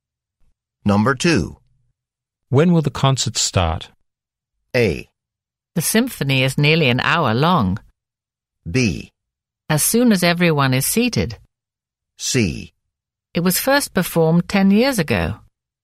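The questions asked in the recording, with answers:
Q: When will the concert start?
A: B: As soon as everyone is seated.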